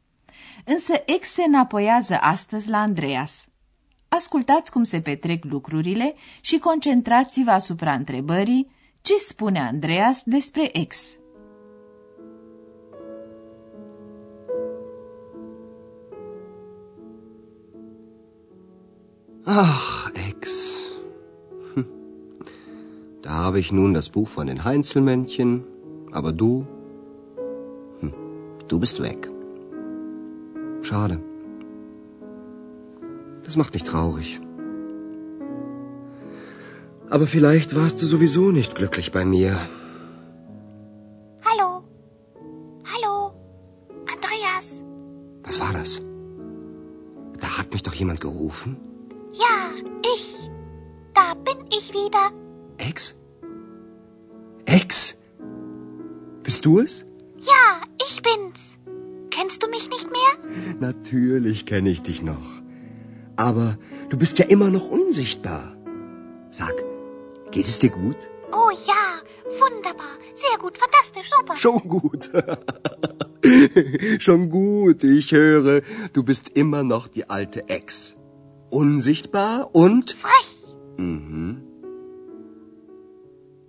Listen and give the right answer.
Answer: Andreas constată că ex a rămas tot cea dinainte.